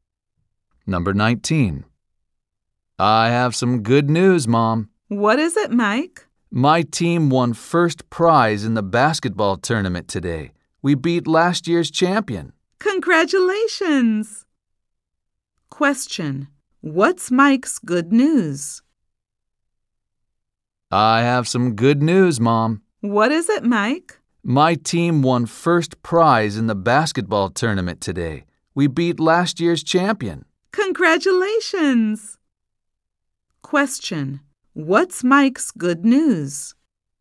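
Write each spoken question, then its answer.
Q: What's Mike's good news?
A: His team won first prize in the basketball tournament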